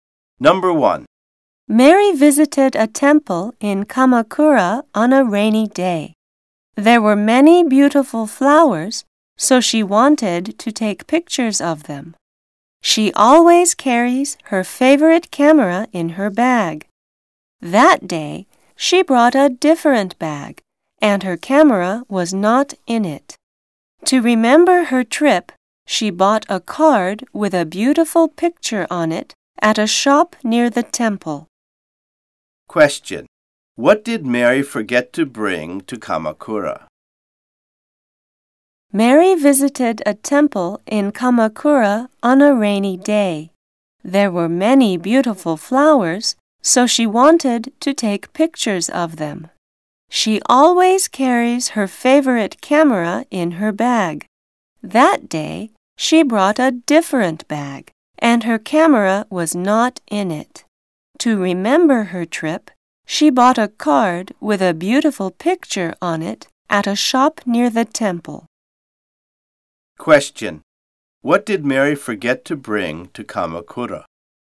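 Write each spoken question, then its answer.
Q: What did Mary forget to bring to Kamakura?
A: Her camera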